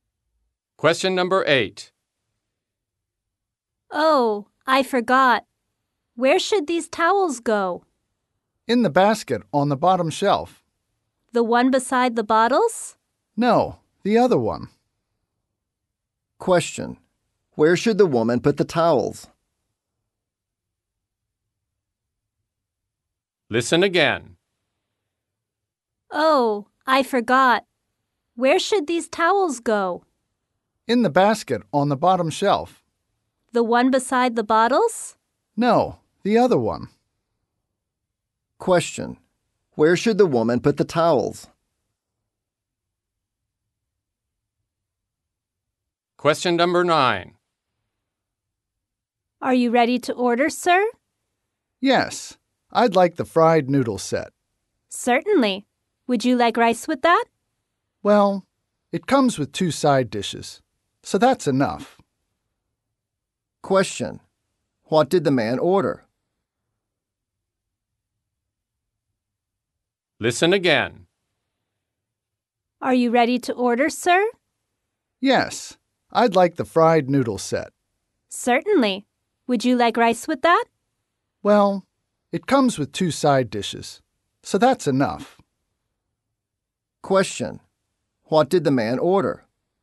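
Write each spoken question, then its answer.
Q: What did the man order?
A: The fried noodle set, with no rice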